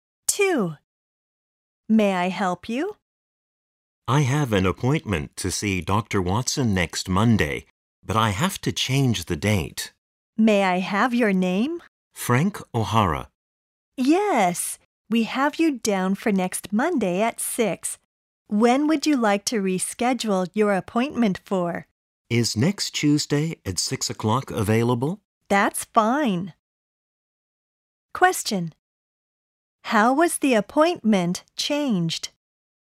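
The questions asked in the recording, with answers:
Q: How was the appointment changed?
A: It was moved from next Monday at 6 to next Tuesday at 6.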